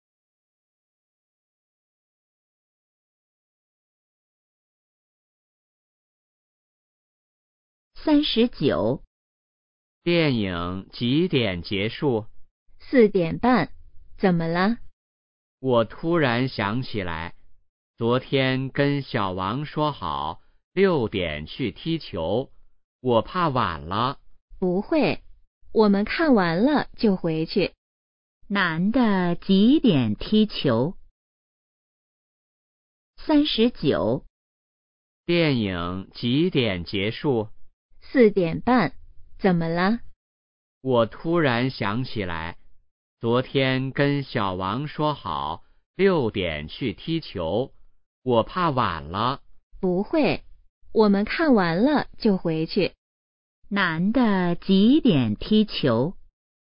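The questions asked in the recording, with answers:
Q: 男的几点踢球?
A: 6点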